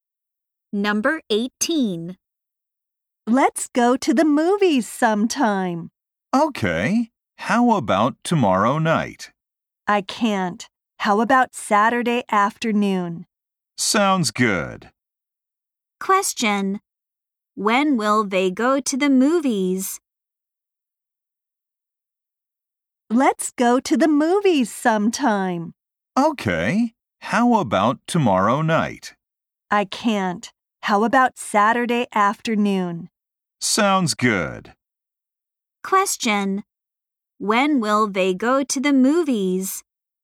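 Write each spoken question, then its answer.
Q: When will they go to the movies?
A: On Saturday afternoon.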